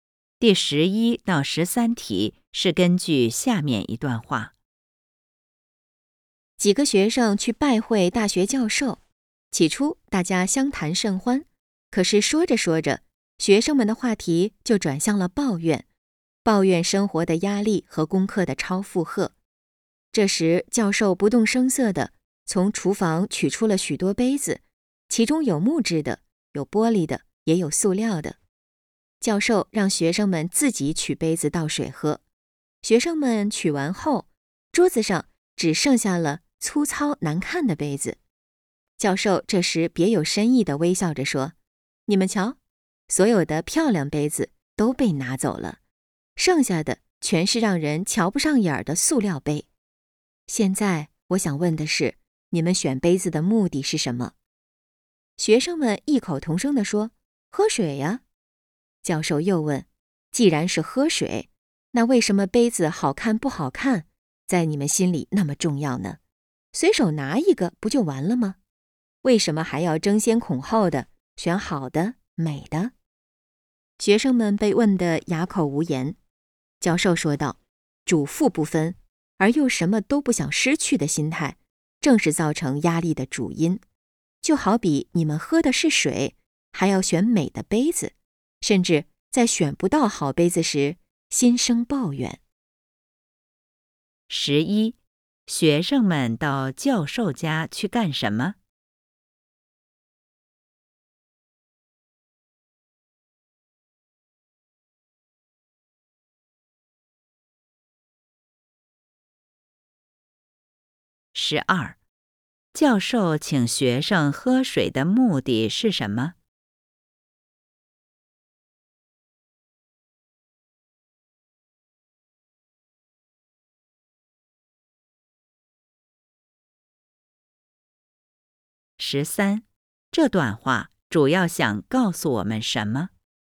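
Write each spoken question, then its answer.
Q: 十一,学生们到教授家去干什么?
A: 拜会教授

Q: 十三,这段话主要想告诉我们什么?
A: 主副不分而又什么都不想失去的心态是造成压力的主因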